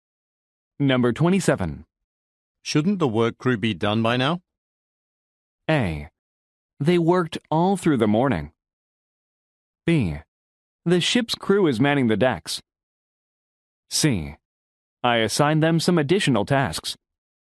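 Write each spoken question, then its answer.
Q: Shouldn't the work crew be done by now?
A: C: I assigned them some additional tasks.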